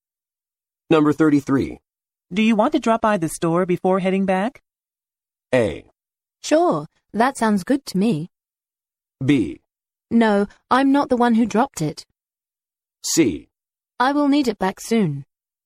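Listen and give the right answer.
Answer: A: Sure, that sounds good to me.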